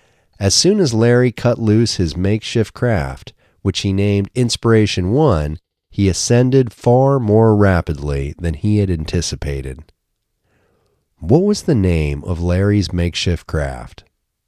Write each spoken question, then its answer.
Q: What was the name of Larry's makeshift craft?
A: Larry's makeshift craft was named Inspiration 1.